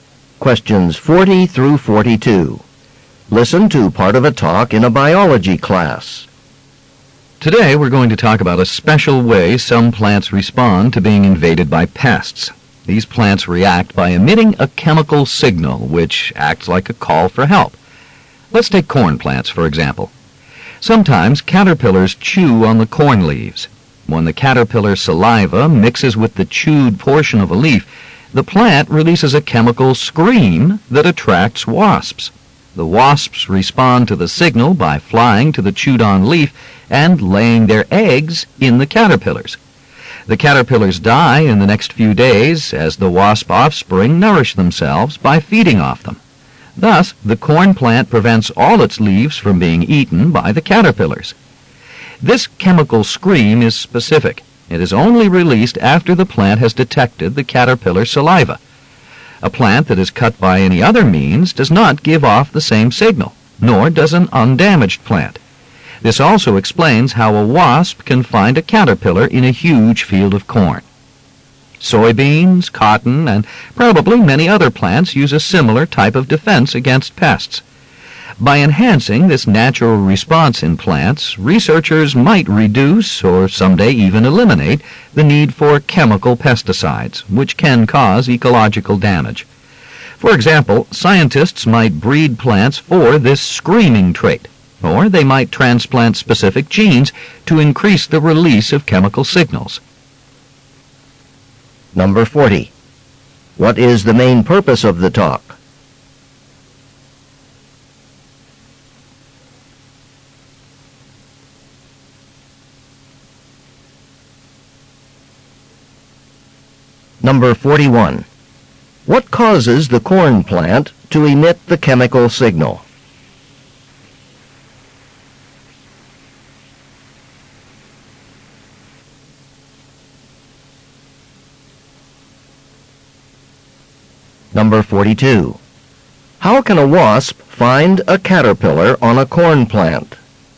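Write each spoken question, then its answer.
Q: What is the main purpose of the talk?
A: To explain how plants signal for help against pests

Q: What causes the corn plant to emit the chemical signal?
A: Caterpillar saliva on chewed leaves

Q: How can a wasp find a caterpillar on a corn plant?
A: By following the plant's chemical signal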